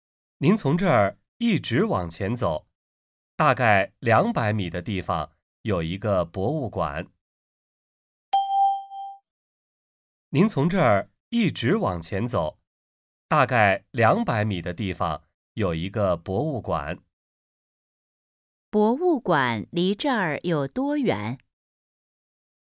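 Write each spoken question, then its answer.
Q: 博物馆离这儿有多远?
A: 大概200米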